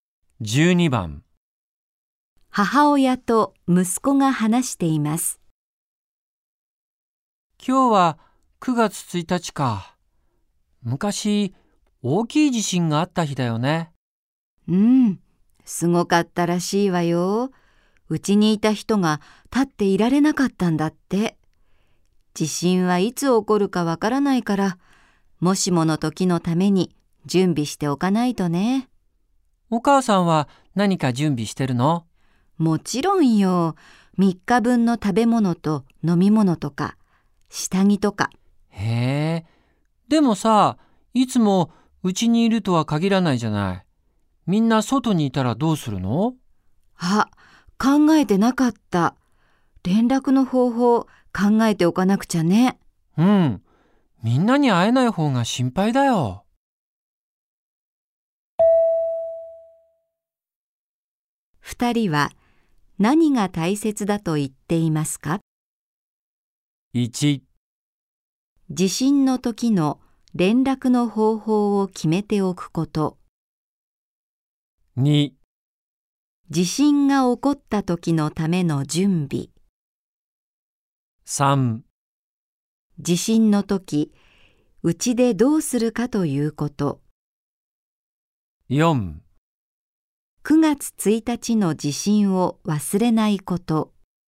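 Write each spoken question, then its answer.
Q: 二人は何が大切だと言っていますか?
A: 1: 地震の時の連絡の方法を決めておくこと。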